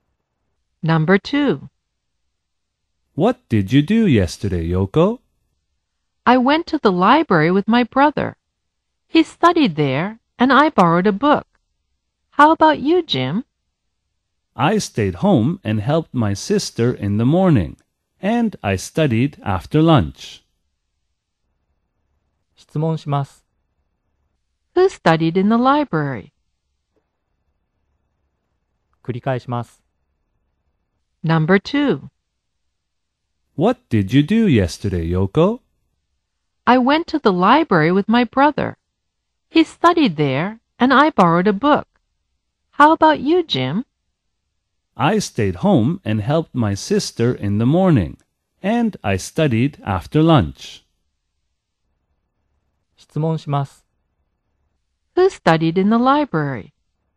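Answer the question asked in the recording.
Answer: Yoko's brother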